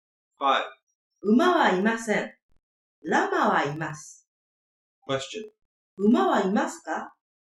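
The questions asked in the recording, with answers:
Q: 馬はいますか?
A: いいえ、いません。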